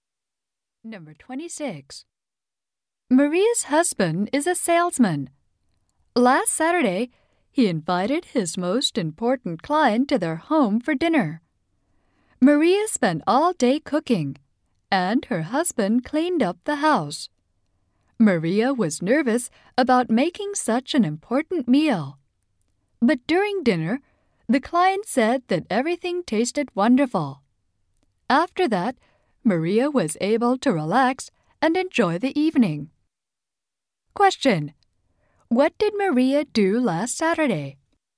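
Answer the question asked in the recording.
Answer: She cooked dinner for her husband's important client.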